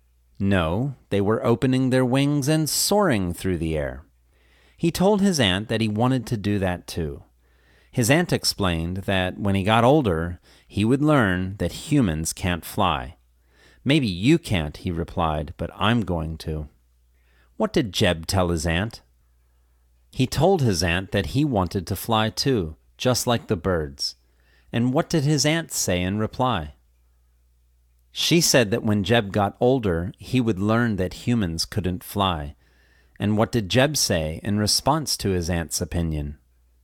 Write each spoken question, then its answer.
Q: What did Jeb tell his aunt?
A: He told his aunt that he wanted to fly too, just like the birds.

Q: And what did Jeb say in response to his aunt's opinion?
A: He said, "Maybe you can't, but I'm going to."